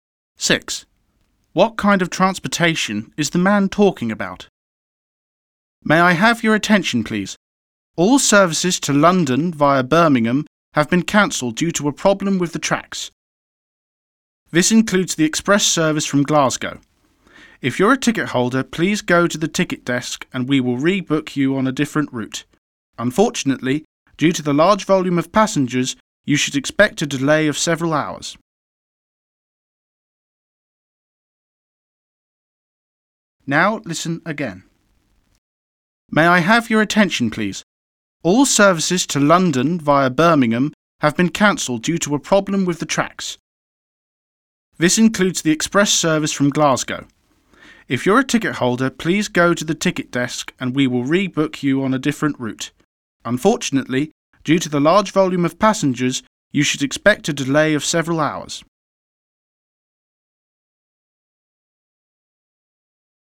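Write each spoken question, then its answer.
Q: What kind of transportation is the man talking about?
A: train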